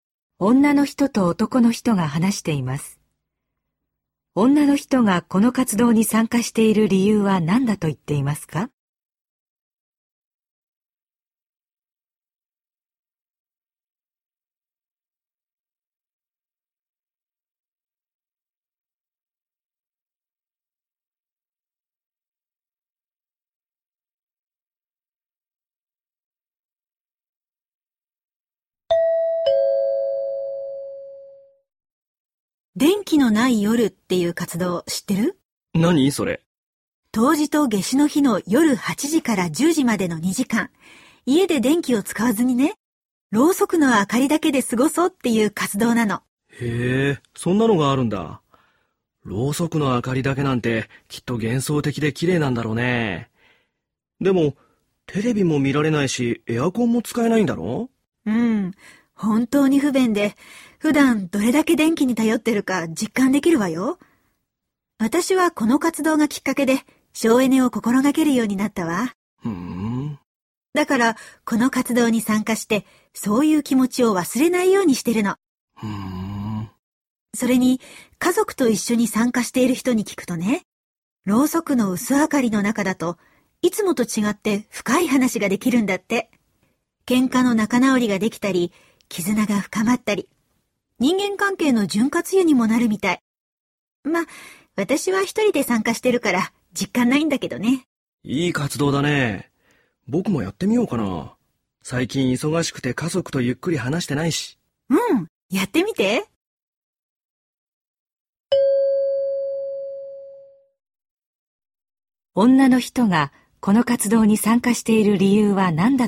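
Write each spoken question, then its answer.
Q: 女の人がこの活動に参加している理由は何だと言っていますか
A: 省エネを心がける気持ちを忘れないため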